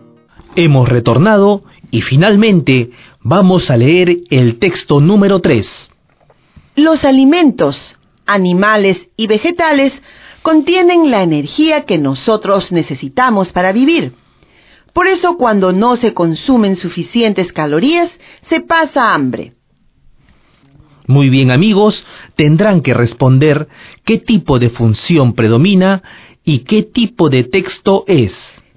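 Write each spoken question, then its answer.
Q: Muy bien, amigos, tendrán que responder qué tipo de función predomina y qué tipo de texto es.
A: Función referencial; texto referencial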